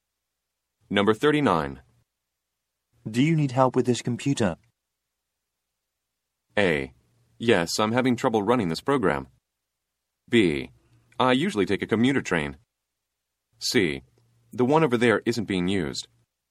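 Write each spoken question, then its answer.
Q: Do you need help with this computer?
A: A: Yes, I'm having trouble running this program.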